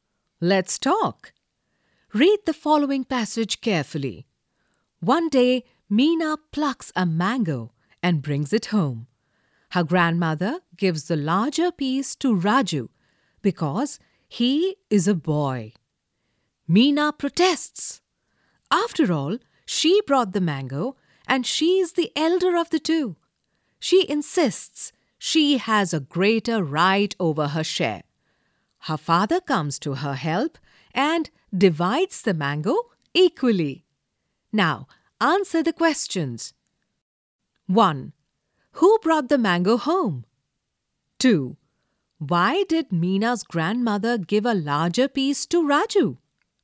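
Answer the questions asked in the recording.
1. Meena
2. Because he is a boy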